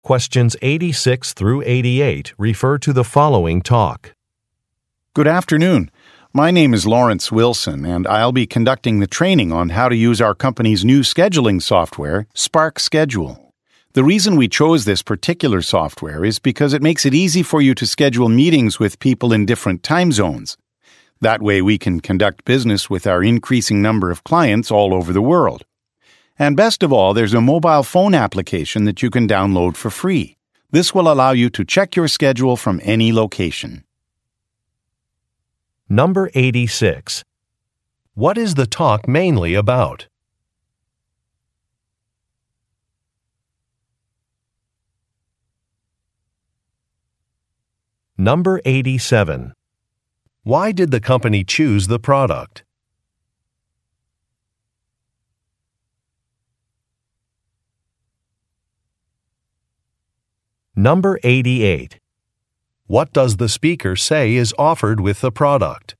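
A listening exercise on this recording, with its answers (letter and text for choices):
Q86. What is the talk mainly about?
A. A mobile phone model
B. An office security system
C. High-speed Internet service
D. Business scheduling software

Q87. Why did the company choose the product?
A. It makes arranging meetings easy.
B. It is reasonably priced.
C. It has good security features.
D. It has received positive reviews.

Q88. What does the speaker say is offered with the product?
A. An annual upgrade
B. A money-back guarantee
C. A mobile phone application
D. A customer-service help line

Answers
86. D. Business scheduling software
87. A. It makes arranging meetings easy.
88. C. A mobile phone application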